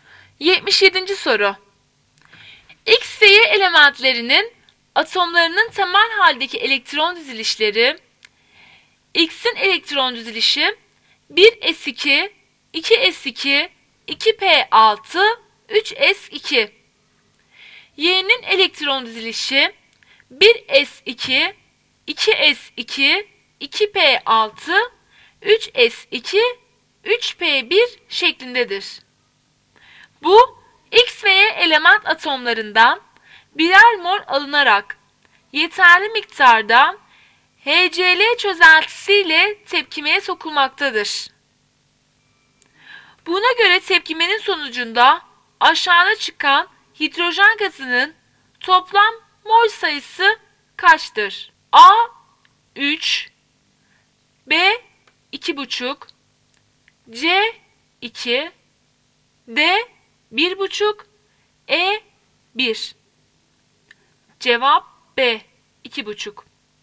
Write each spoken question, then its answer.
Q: Buna göre tepkimenin sonucunda aşağıda çıkan hidrojen gazının toplam mol sayısı kaçtır?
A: Cevap B. 2,5.